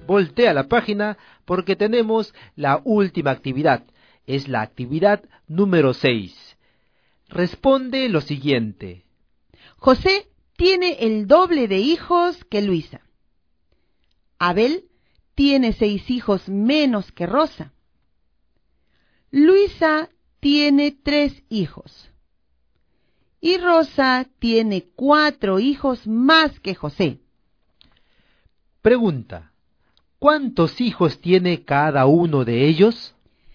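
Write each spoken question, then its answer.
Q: Pregunta, ¿cuántos hijos tiene cada uno de ellos?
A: Luisa 3, José 6, Rosa 10, Abel 4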